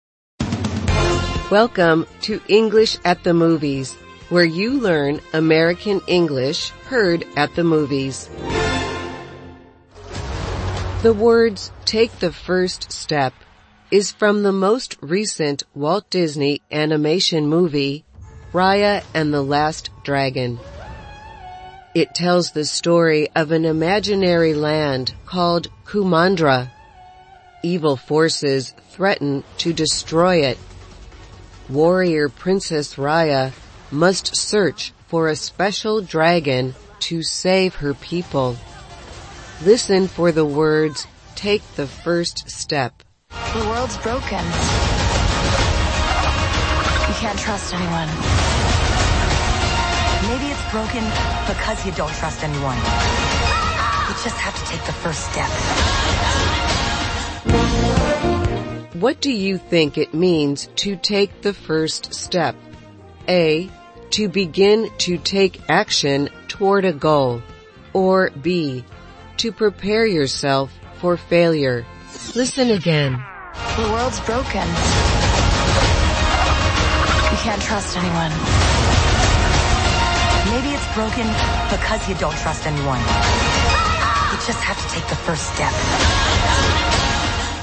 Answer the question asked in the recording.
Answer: The answer is A. To take the first step is to begin to take action toward a goal.